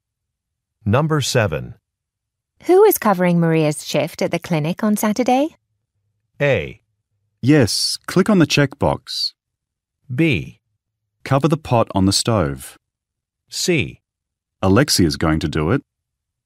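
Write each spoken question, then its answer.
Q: Who is covering Maria's shift at the clinic on Saturday?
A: C: Alexia is going to do it.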